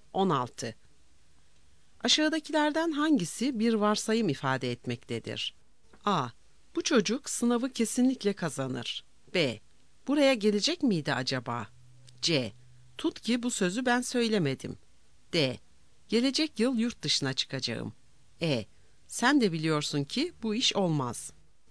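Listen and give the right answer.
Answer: C: Tut ki bu sözü ben söylemedim.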